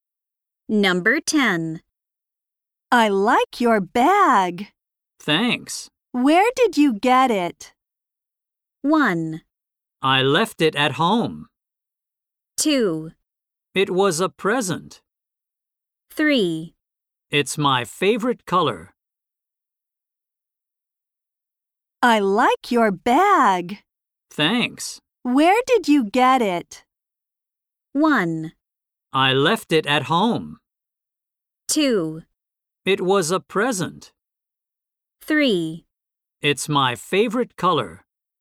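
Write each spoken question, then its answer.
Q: Where did you get it?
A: 2: It was a present.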